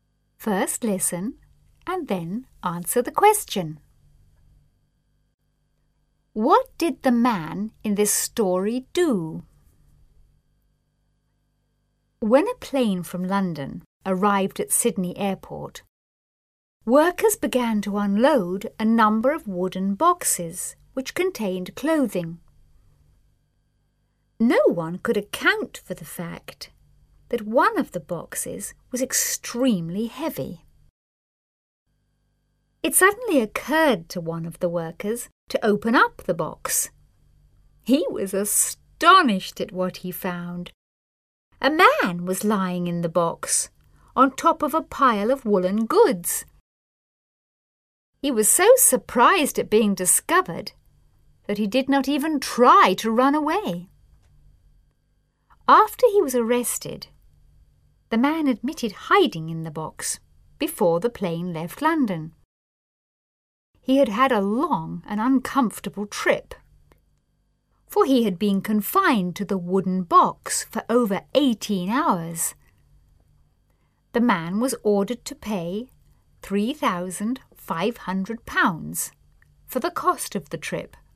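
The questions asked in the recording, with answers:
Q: What did the man in this story do?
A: He hid in a wooden box on a plane from London to Sydney to travel without a ticket.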